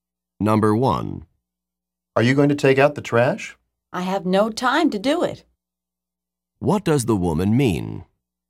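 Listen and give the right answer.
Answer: She doesn't have time to take out the trash.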